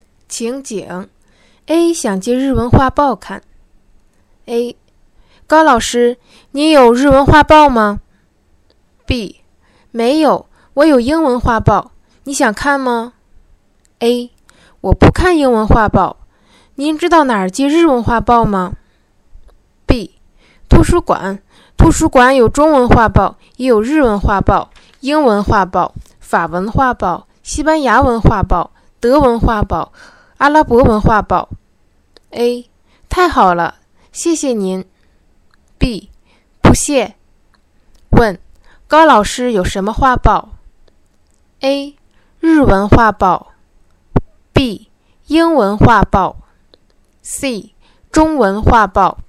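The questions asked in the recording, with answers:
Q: 问高老师有什么画报?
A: B: 英文画报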